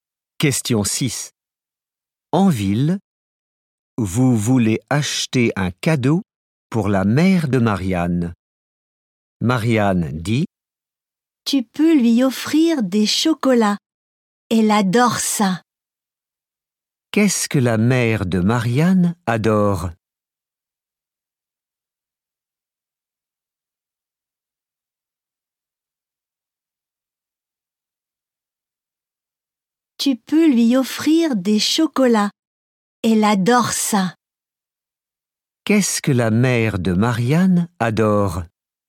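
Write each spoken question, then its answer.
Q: Qu'est-ce que la mère de Marianne adore ?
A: Les chocolats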